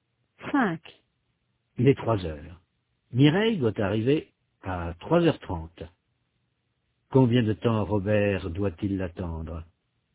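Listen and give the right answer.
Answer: Une demi-heure (30 minutes)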